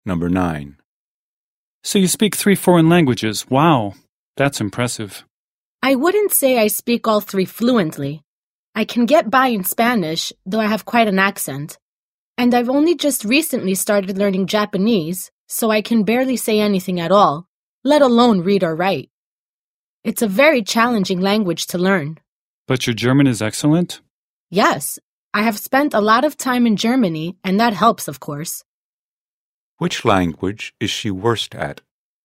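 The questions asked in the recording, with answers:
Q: Which language is she worst at?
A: Japanese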